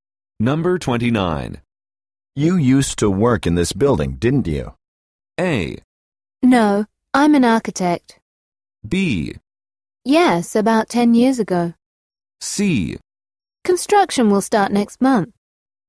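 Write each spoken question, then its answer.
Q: You used to work in this building, didn't you?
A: B: Yes, about 10 years ago.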